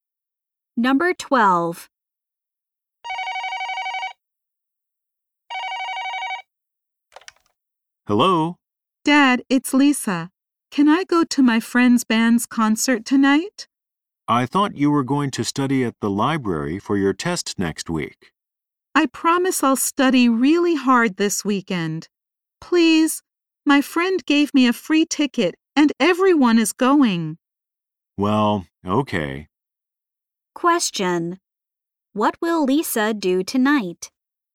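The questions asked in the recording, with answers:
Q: what will Lisa do tonight?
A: Go to her friend's band's concert.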